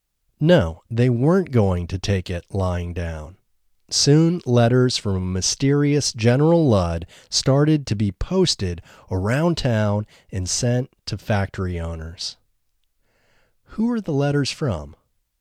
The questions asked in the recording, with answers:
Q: Who are the letters from?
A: The letters were from a mysterious General Ludd.